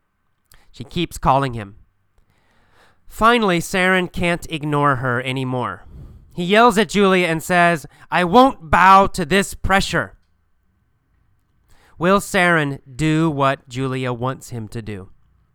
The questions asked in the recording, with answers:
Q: Will Saren do what Julia wants him to do?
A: No, he won't. He won't bow to the pressure.